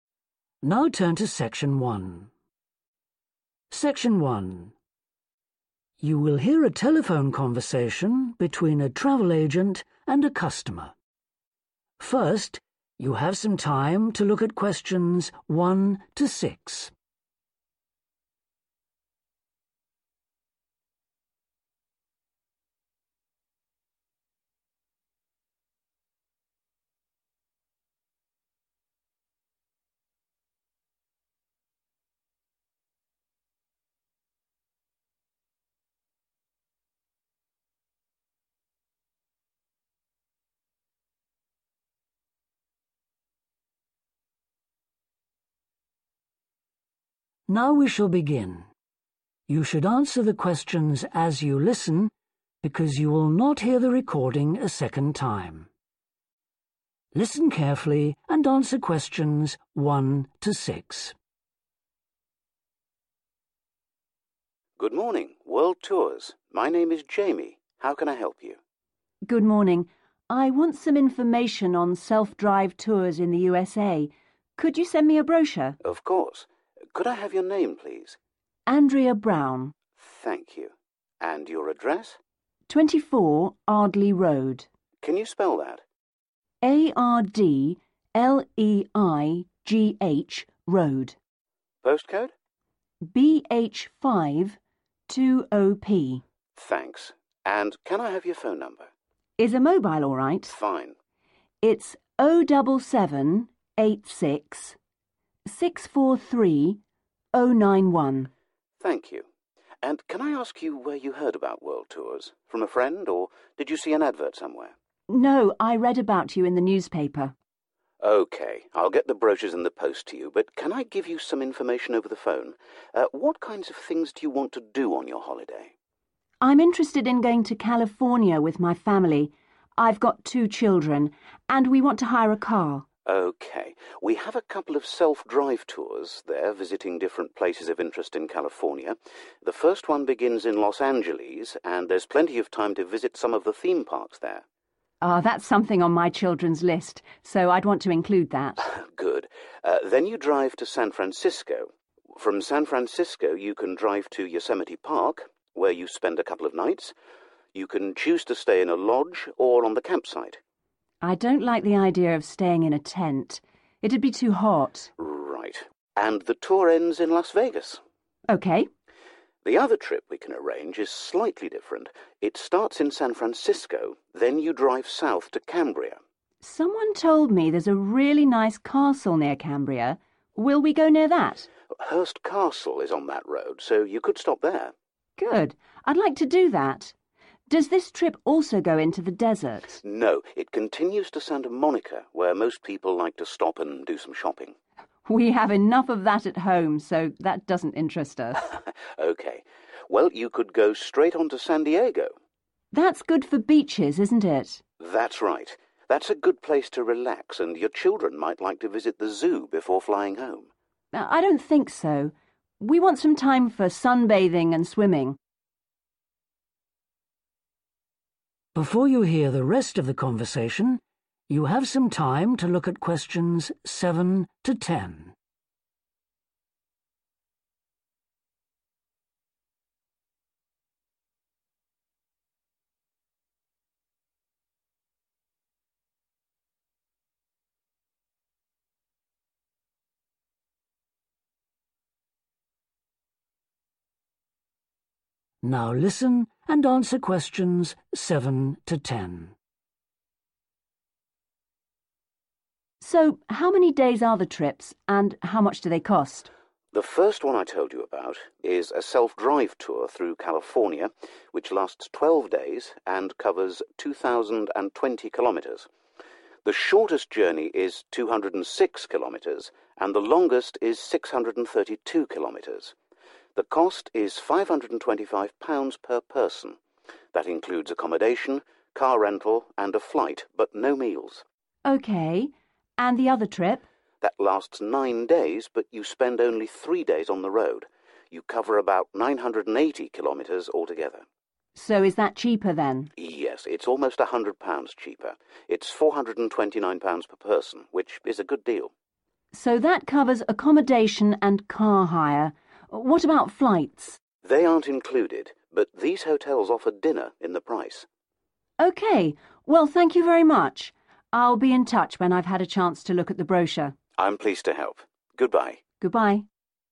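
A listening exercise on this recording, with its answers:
Write ONE WORD for each answer.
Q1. Address: 24 1.............. Road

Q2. Heard about company from: 2...........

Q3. Los Angeles: customer wants to visit some3.............parks with her children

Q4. Yosemite Park: customer wants to stay in a lodge, not a 4...........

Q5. The customer wants to see the 5................ on the way to Cambria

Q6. At San Diego, wants to spend time on the 6.............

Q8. one 8..............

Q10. 10 .........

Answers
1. Ardleigh
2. newspaper
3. theme
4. tent
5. castle
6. beach
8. flight
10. dinner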